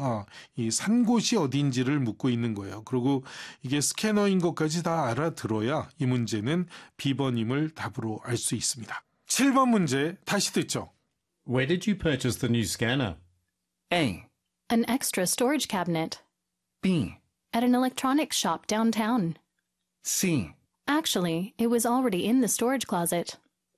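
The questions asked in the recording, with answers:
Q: Where did you purchase the new scanner?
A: B: At an electronics shop downtown.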